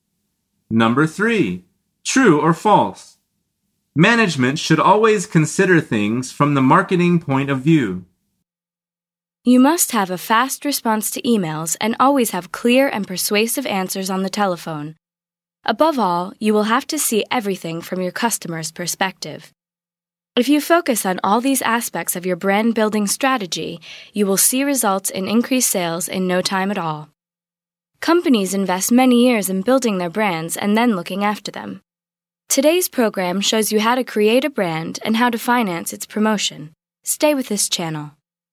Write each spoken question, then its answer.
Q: Management should always consider things from the marketing point of view.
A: The answer is false.